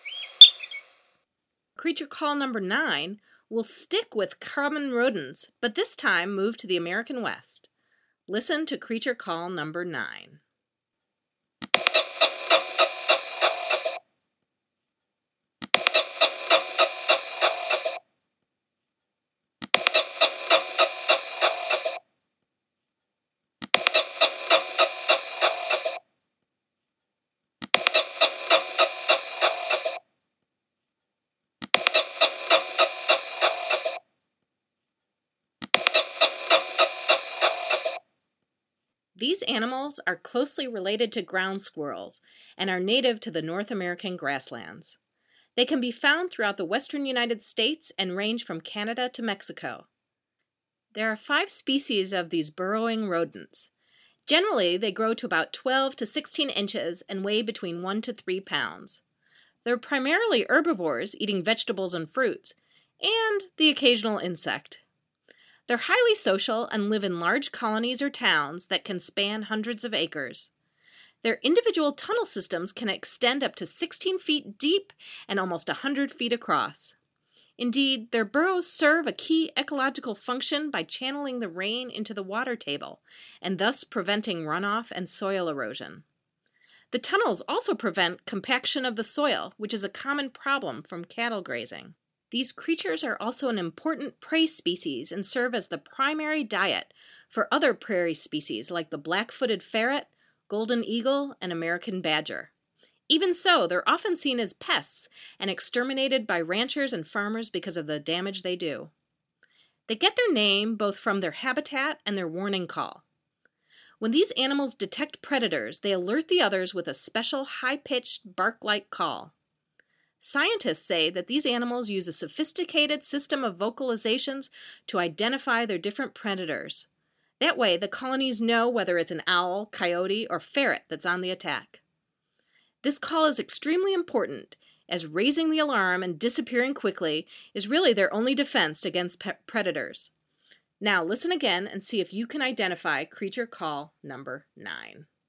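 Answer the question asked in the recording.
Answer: prairie dog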